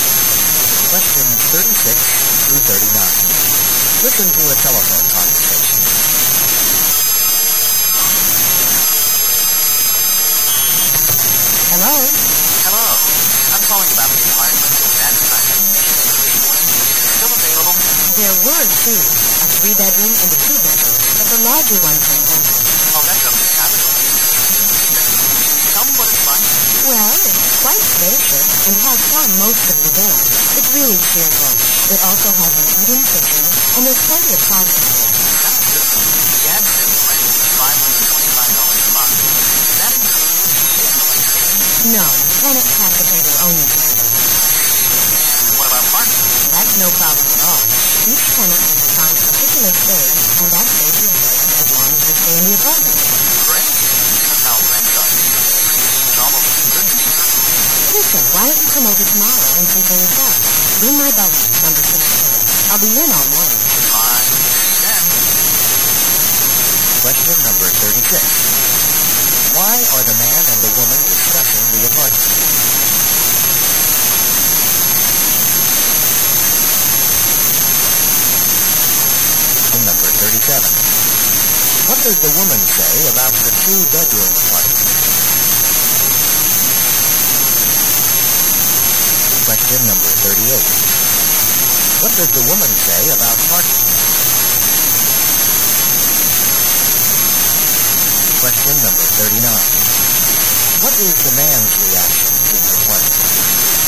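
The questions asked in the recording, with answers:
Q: Why are the man and the woman discussing the apartment?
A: The man is calling about an advertised apartment for rent

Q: What is the man's reaction to the apartment?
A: He thinks it's almost too good to be true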